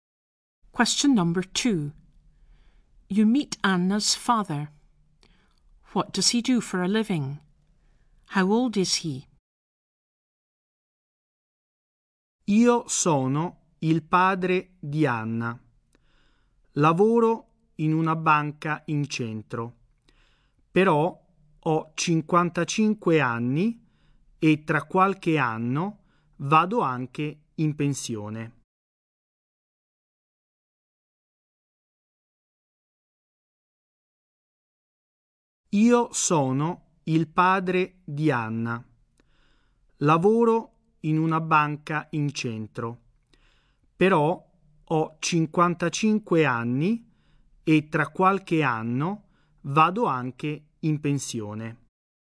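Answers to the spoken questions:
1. He works in a bank in the town centre
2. 55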